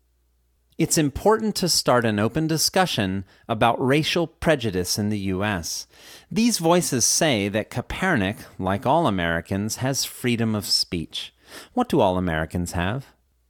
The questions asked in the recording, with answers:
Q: What do all Americans have?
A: All Americans have freedom of speech.